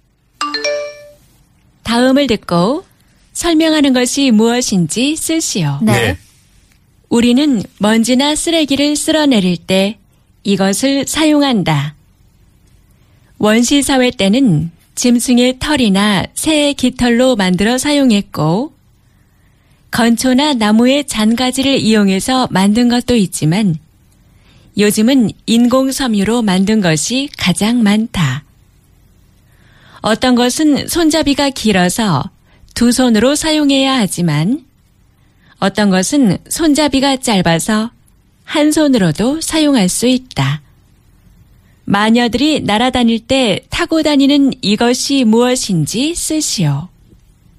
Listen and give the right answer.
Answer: Bichado